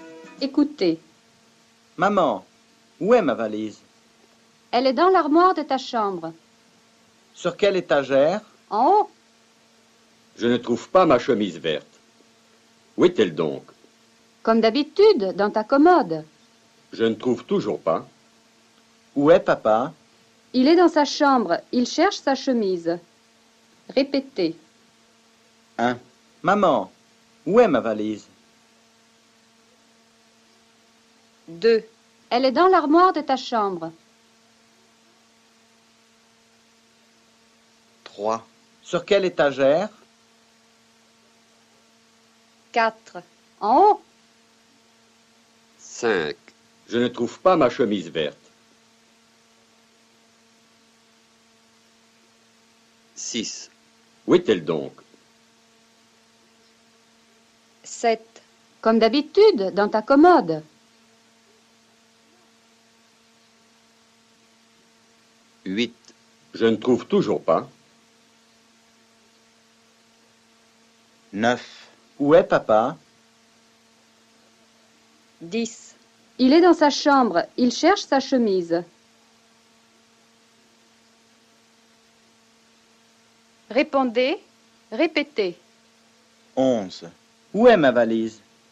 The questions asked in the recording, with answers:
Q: Où est ma valise?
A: Elle est dans l'armoire de ta chambre.